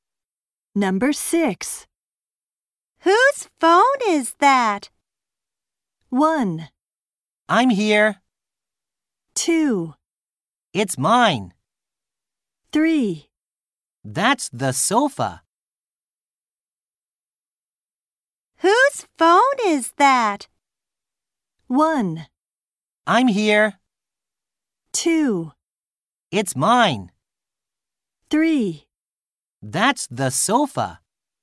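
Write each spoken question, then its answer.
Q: Whose phone is that?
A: 2: It's mine.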